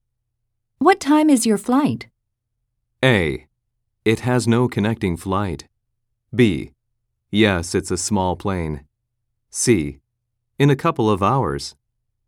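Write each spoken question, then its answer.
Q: What time is your flight?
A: C: In a couple of hours.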